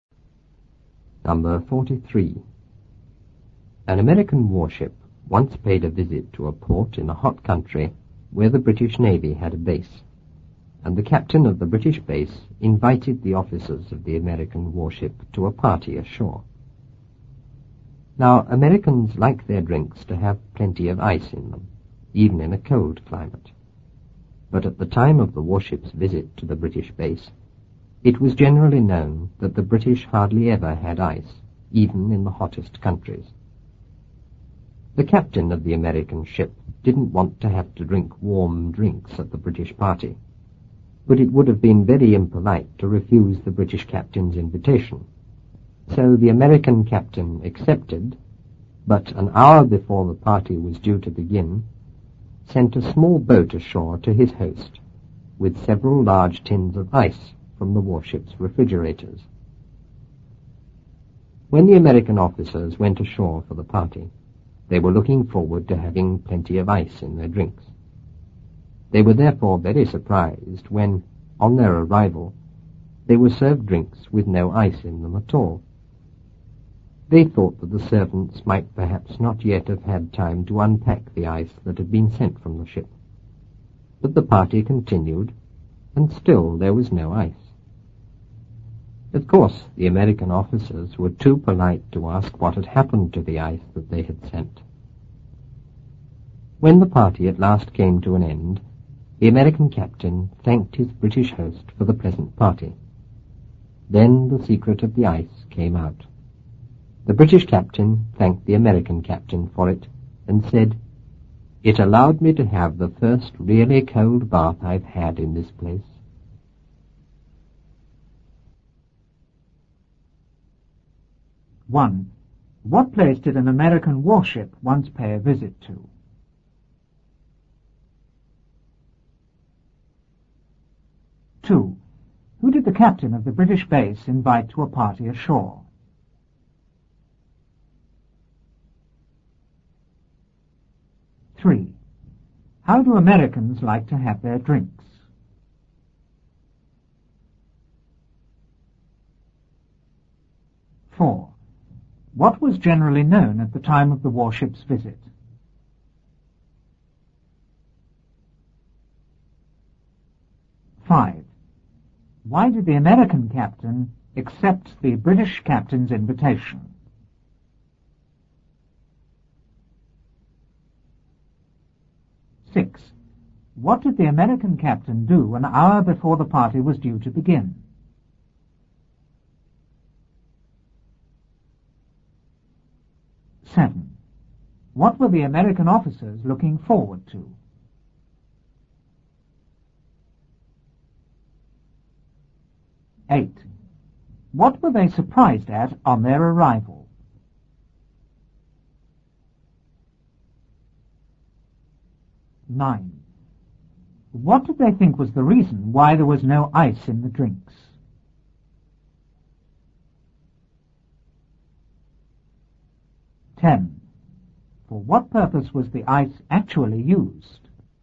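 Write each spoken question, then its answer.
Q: What place did an American warship once pay a visit to?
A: A port in a hot country where the British Navy had a base

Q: Who did the captain of the British base invite to a party ashore?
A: The officers of the American warship

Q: How do Americans like to have their drinks?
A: With plenty of ice in them

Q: What was generally known at the time of the warship's visit?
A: That the British hardly ever had ice, even in the hottest countries

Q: Why did the American captain accept the British captain's invitation?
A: Because refusing would have been very impolite

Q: What did the American captain do an hour before the party was due to begin?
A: He sent a small boat ashore with several large tins of ice

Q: What were the American officers looking forward to?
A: Having plenty of ice in their drinks

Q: What were they surprised at on their arrival?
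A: They were served drinks with no ice in them

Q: What did they think was the reason why there was no ice in the drinks?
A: The servants had not yet had time to unpack the ice

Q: For what purpose was the ice actually used?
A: For the British captain's cold bath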